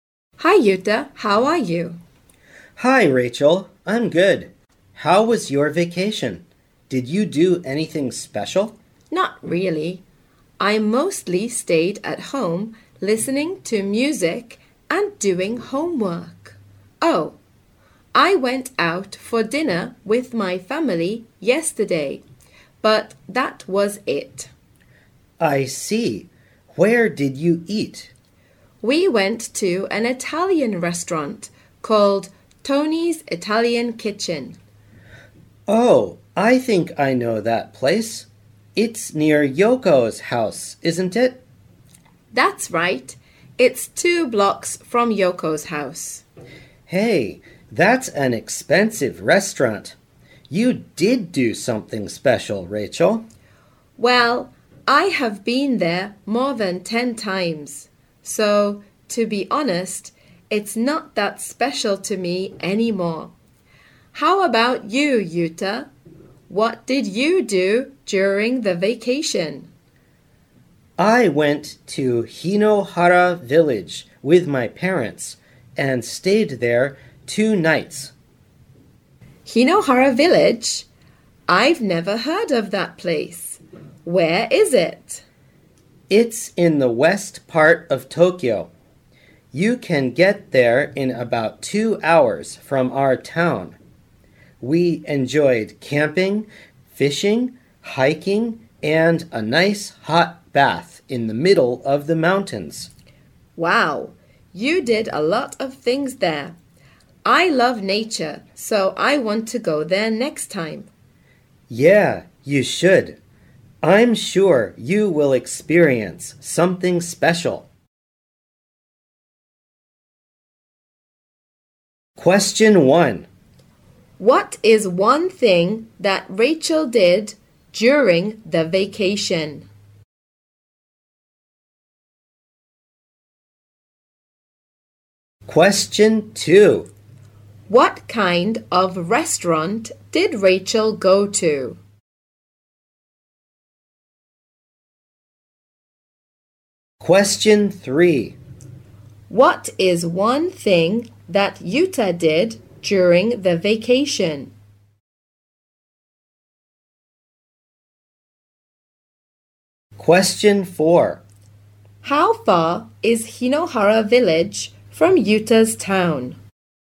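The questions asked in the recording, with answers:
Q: What is one thing that Rachel did during the vacation?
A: She went out for dinner with her family (she also stayed at home listening to music and doing homework).

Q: What kind of restaurant did Rachel go to?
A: An Italian restaurant (Tony's Italian Kitchen).

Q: What is one thing that Yuta did during the vacation?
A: He went to Hinohara Village with his parents, where they went camping, fishing and hiking.

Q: How far is Hinohara Village from Yuta's town?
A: About 2 hours away.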